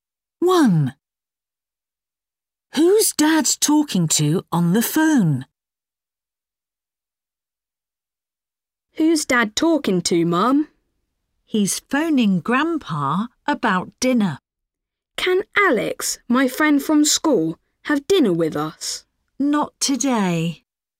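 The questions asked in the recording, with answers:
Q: Who's Dad talking to on the phone?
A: Grandpa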